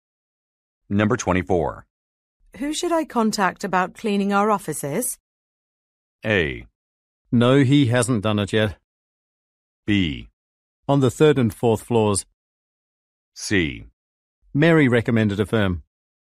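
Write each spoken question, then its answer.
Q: Who should I contact about cleaning our offices?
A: C: Mary recommended a firm.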